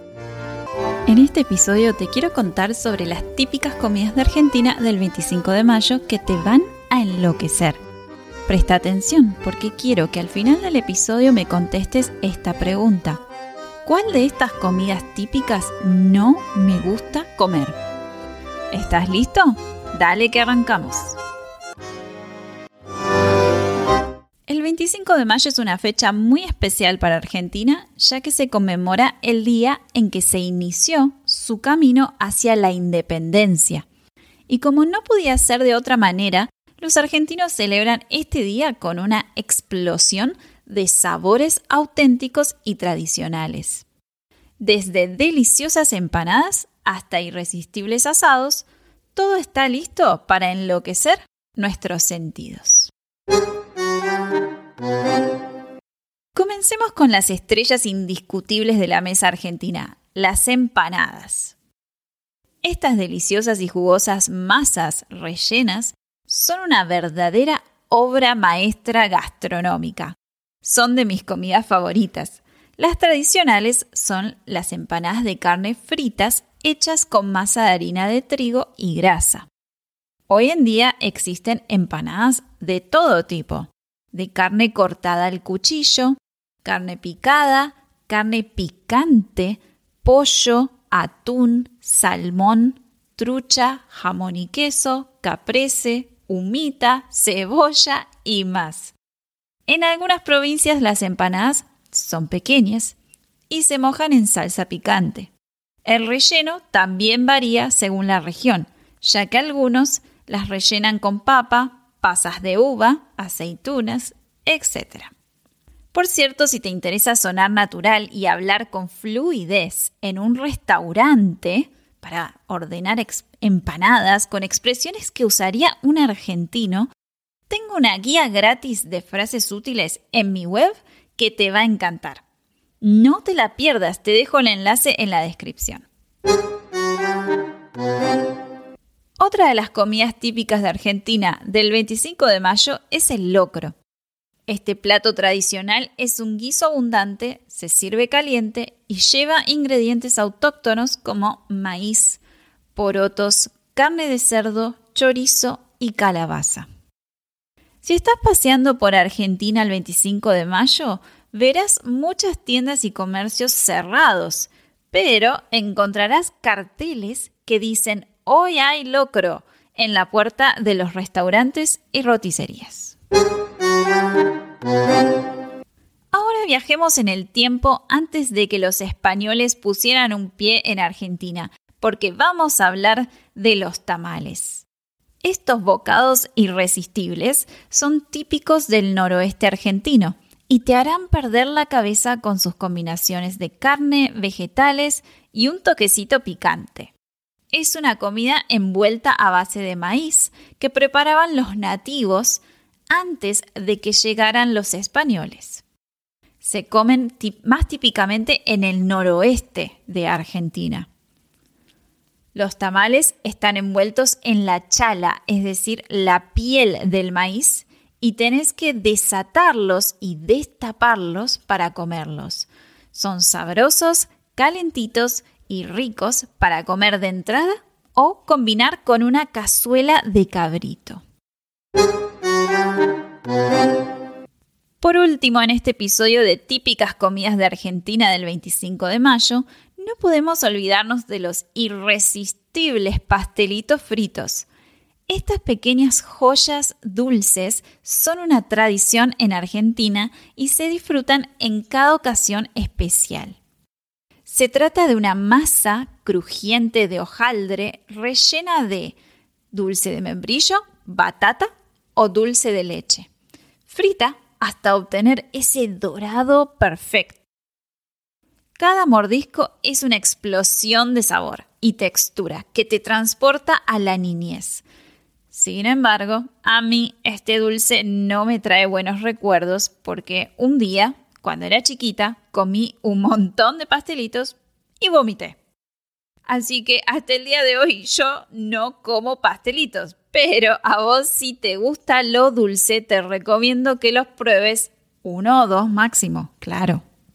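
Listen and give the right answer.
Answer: los pastelitos fritos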